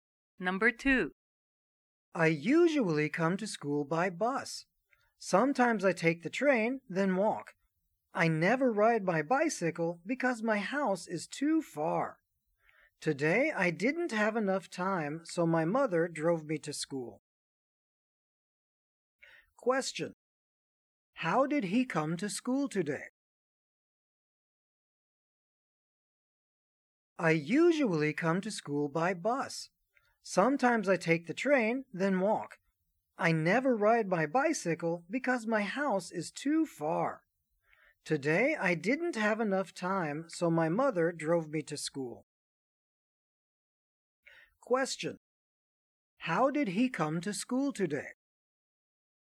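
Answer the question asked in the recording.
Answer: His mother drove him (by car)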